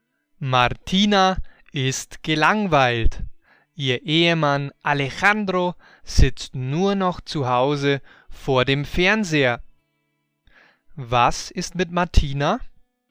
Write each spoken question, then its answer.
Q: Was ist mit Martina?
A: Sie ist gelangweilt.